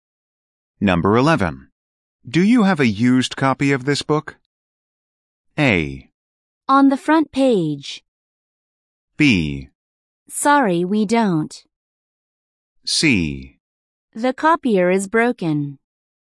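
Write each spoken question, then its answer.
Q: Do you have a used copy of this book?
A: B: Sorry, we don't.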